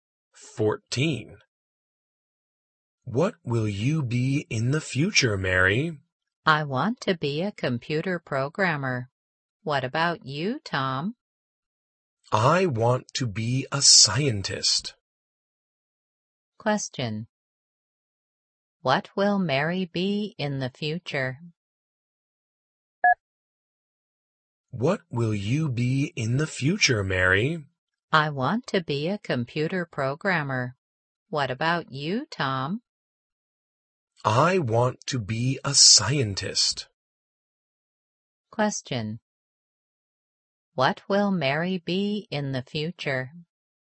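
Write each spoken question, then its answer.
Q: What will Mary be in the future?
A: A computer programmer.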